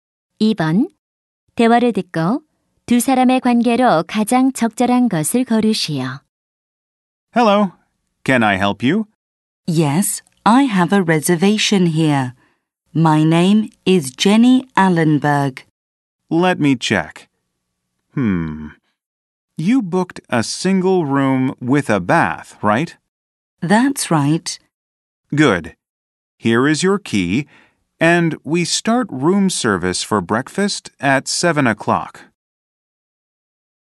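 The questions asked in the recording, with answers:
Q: 대화를 듣고 두 사람의 관계로 가장 적절한 것을 고르시오.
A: 호텔 직원 - 투숙객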